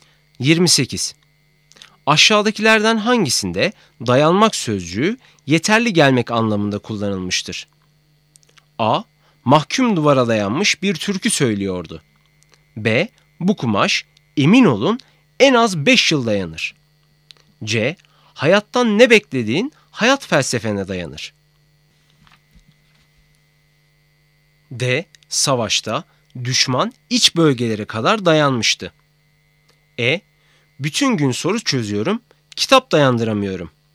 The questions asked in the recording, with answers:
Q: Aşağıdakilerden hangisinde dayanmak sözcüğü yeterli gelmek anlamında kullanılmıştır?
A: Doğru cevap E. Bütün gün soru çözüyorum, kitap dayandıramıyorum.